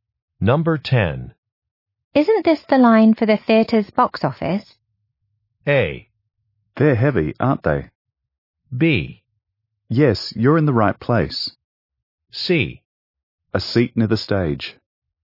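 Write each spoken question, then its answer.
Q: Isn't this the line for the theater's box office?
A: B: Yes, you're in the right place.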